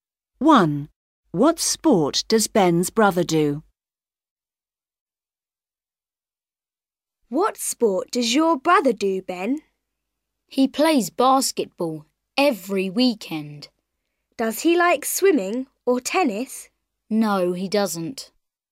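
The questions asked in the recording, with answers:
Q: What sport does Ben's brother do?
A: basketball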